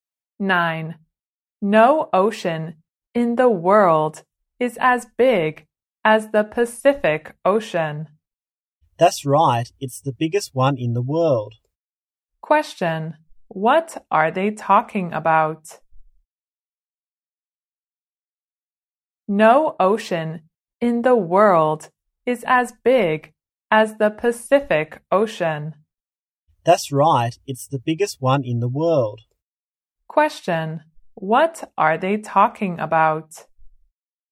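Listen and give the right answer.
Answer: The Pacific Ocean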